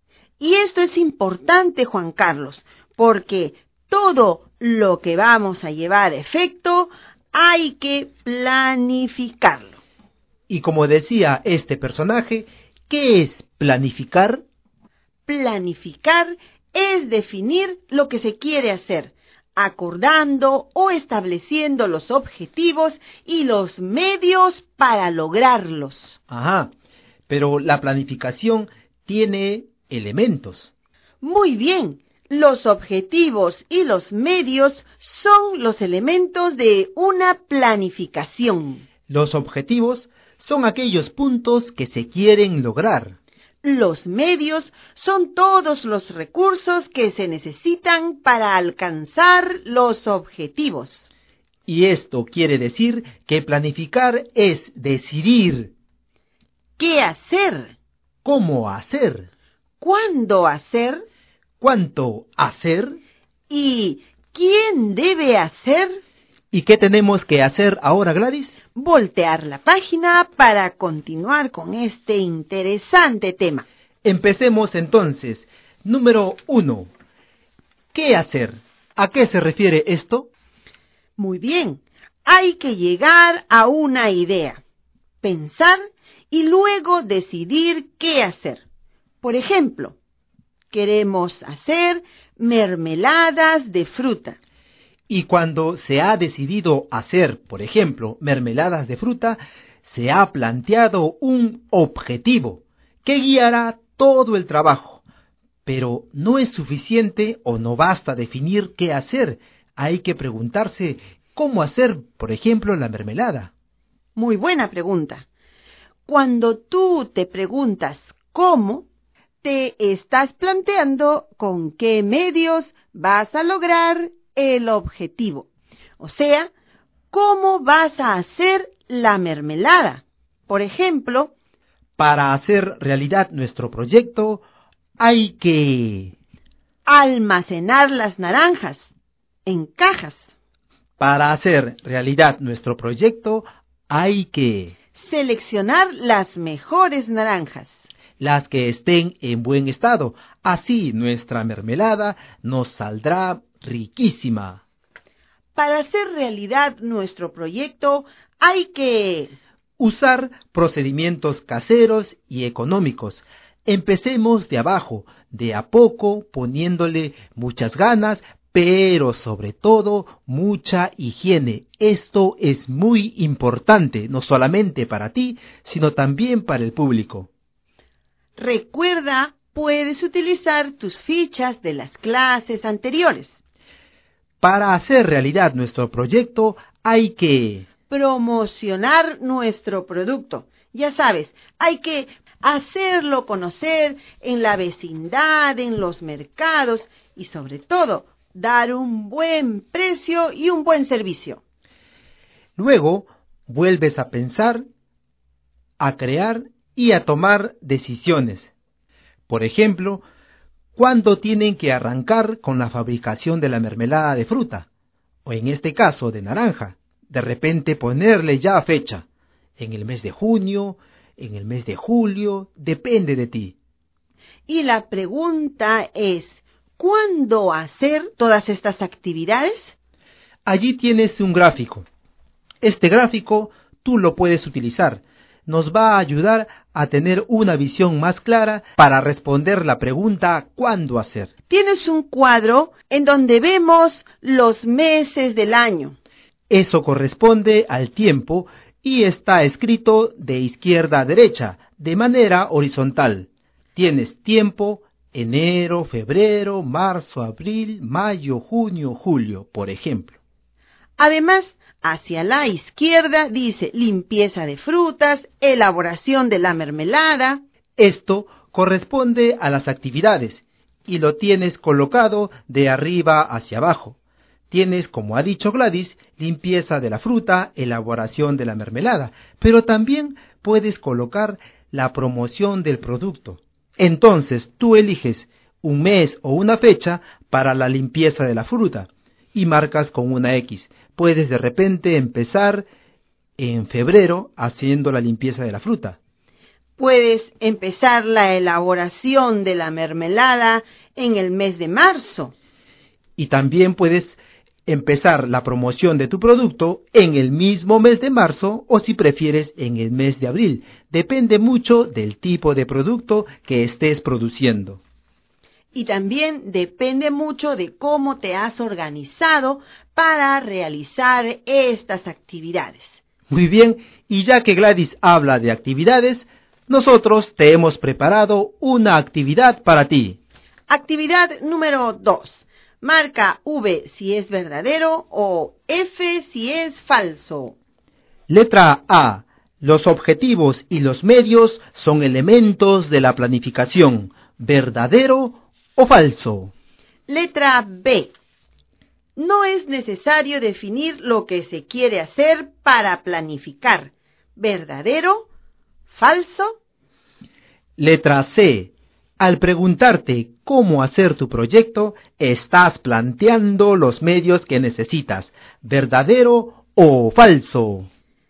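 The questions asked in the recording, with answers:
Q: Los objetivos y los medios son elementos de la planificación. ¿Verdadero o falso?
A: Verdadero

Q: No es necesario definir lo que se quiere hacer para planificar. ¿Verdadero? ¿Falso?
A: Falso

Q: Al preguntarte cómo hacer tu proyecto, estás planteando los medios que necesitas. ¿Verdadero o falso?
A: Verdadero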